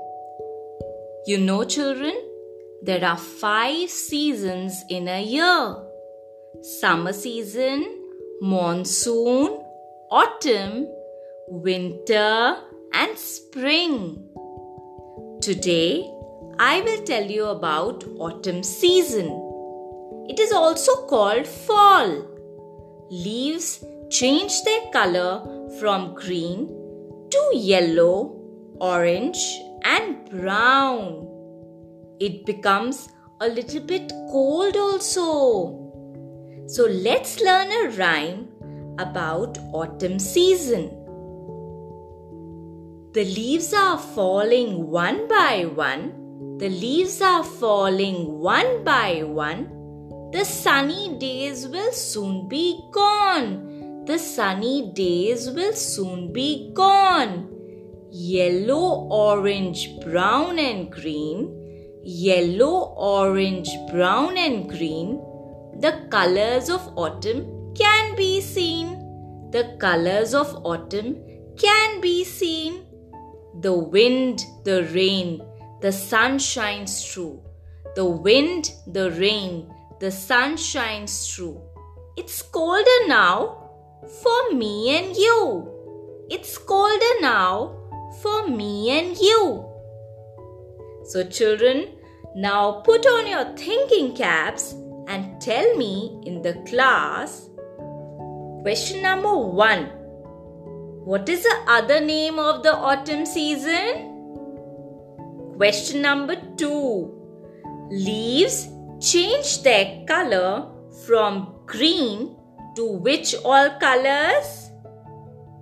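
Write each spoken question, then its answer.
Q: What is the other name of the autumn season?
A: Fall

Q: Leaves change their color from green to which all colors?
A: Yellow, orange, and brown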